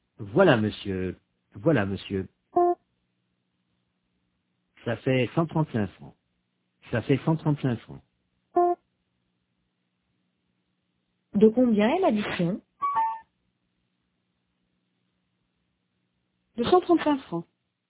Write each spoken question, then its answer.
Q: De combien est l'addition?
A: De 135 francs.